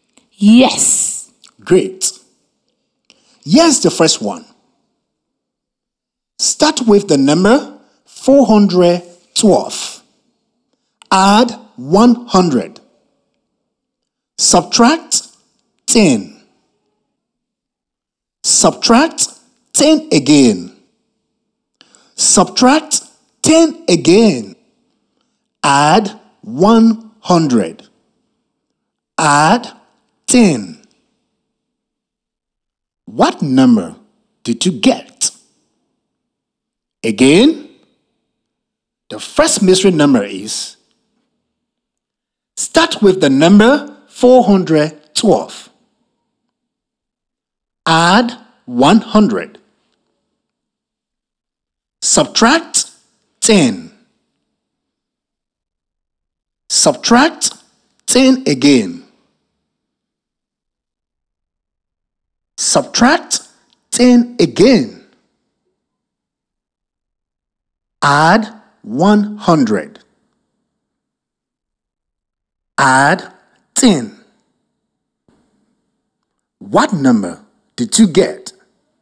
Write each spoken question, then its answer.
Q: What number did you get?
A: Adding 10 gave us 592.